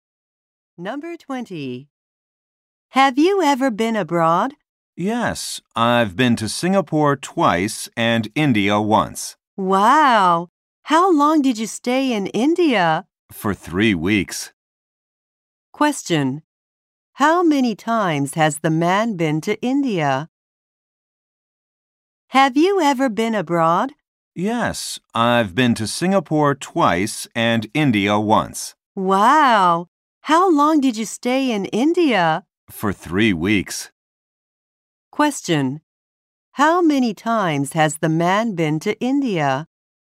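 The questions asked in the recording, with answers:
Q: How many times has the man been to India?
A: Once.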